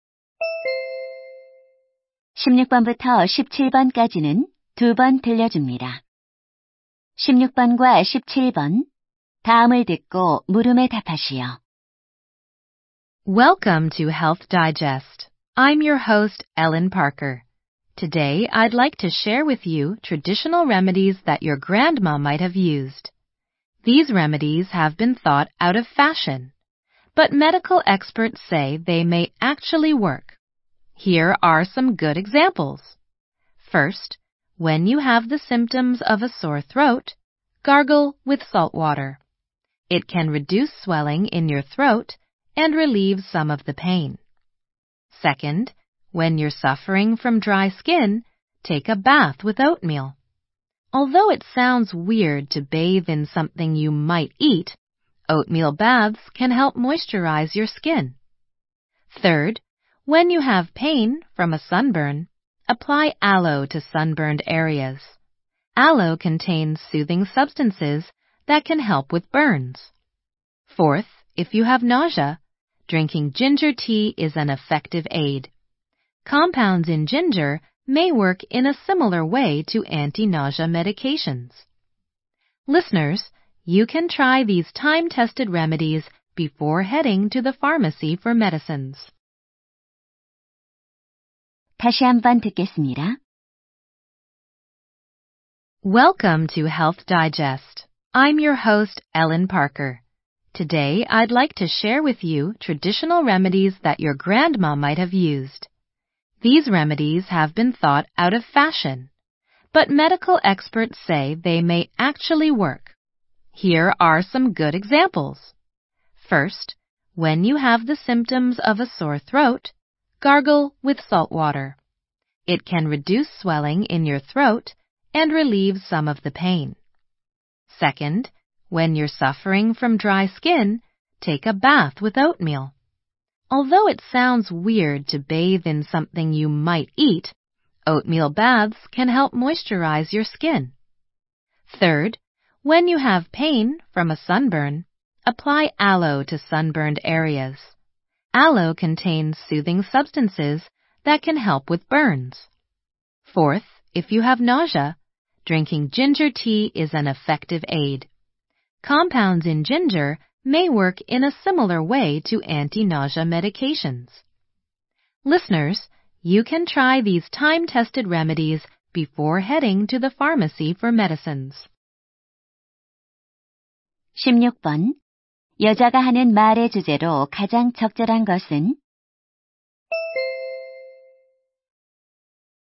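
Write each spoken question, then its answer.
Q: 여자가 하는 말의 주제로 가장 적절한 것은?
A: 효과가 있는 전통 민간요법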